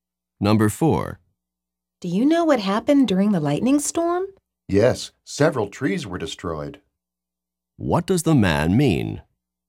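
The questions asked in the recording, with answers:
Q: What does the man mean?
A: Several trees were destroyed in the storm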